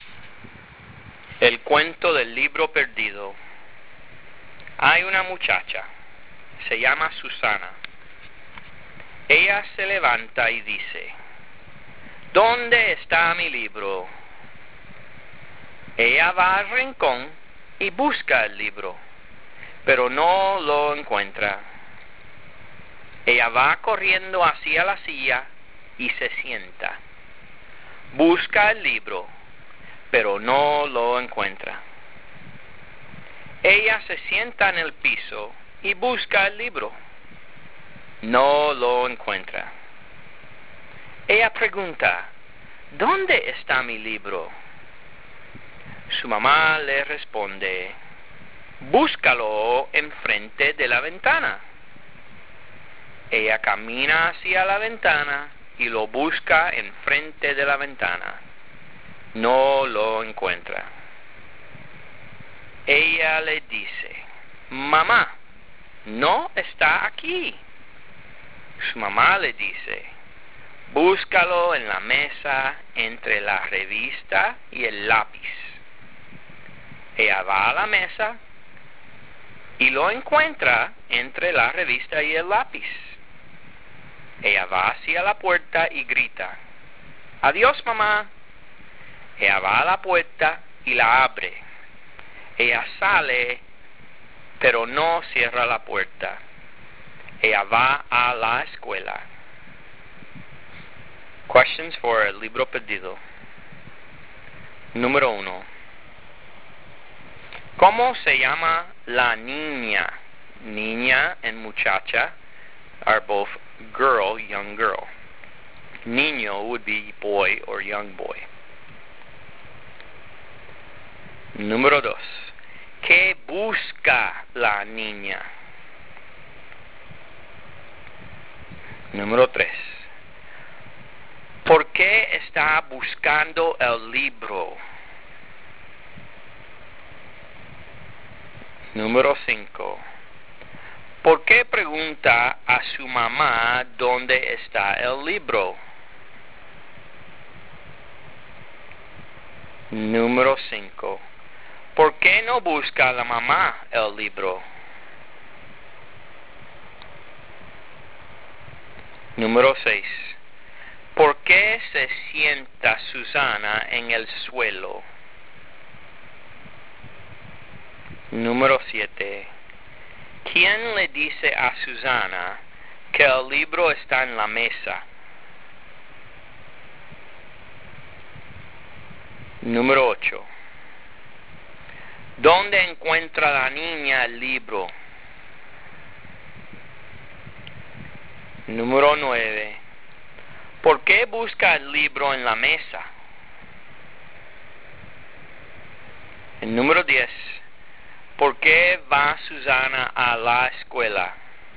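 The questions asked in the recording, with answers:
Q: ¿Cómo se llama la niña?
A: Susana

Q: ¿Qué busca la niña?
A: Su libro

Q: ¿Quién le dice a Susana que el libro está en la mesa?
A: Su mamá

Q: ¿Dónde encuentra la niña el libro?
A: En la mesa, entre la revista y el lápiz

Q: ¿Por qué busca el libro en la mesa?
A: Porque su mamá se lo dice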